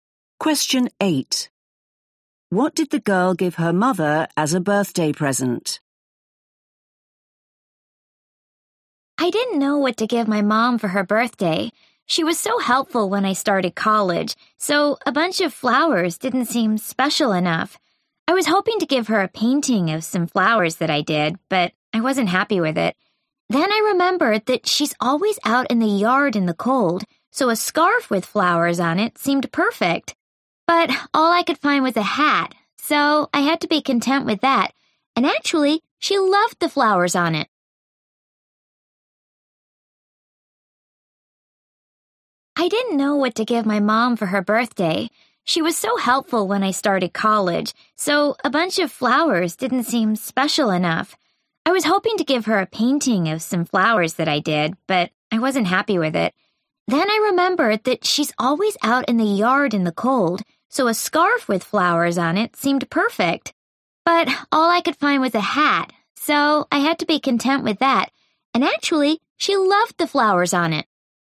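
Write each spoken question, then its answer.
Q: What did the girl give her mother as a birthday present?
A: a hat with flowers on it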